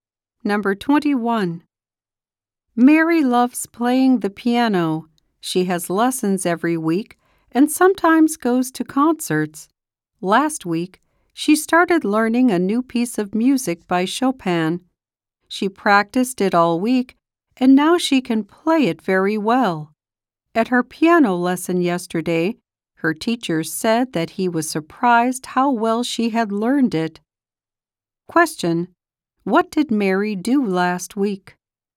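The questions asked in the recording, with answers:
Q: What did Mary do last week?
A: She started learning a new piece by Chopin and practiced it.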